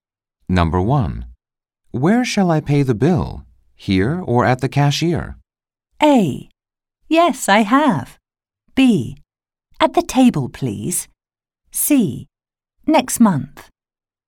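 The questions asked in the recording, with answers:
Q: Where shall I pay the bill? Here or at the cashier?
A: B: At the table, please.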